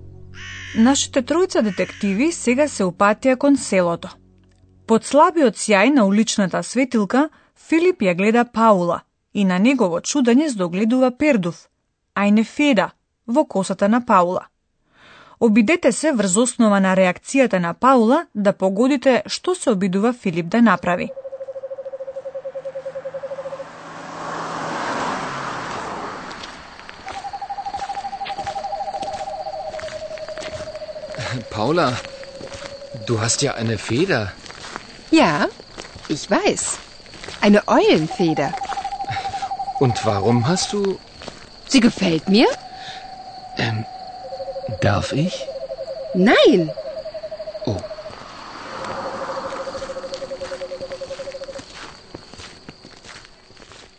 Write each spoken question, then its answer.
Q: Обидете се врз основа на реакцијата на Паула да погодите што се обидува Филип да направи.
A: Филип се обидува да го извлече пердувот од косата на Паула.